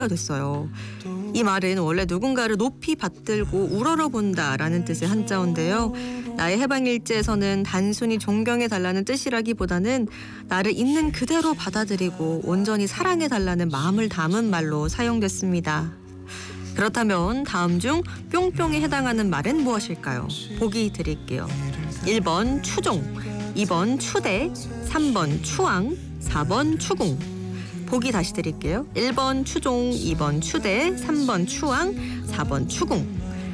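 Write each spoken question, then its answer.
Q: 그렇다면 다음 중 뿅뿅에 해당하는 말은 무엇일까요?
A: 3: 추앙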